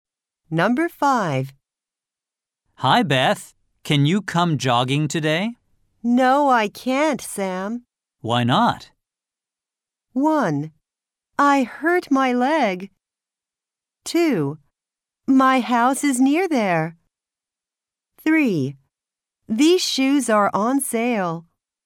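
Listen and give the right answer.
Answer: 1: I hurt my leg.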